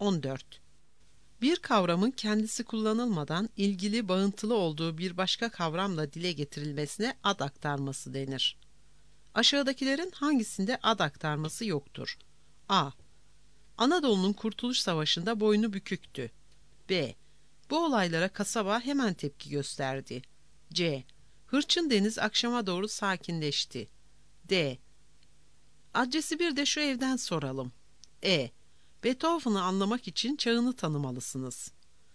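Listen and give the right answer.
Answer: C: Hırçın deniz akşama doğru sakinleşti.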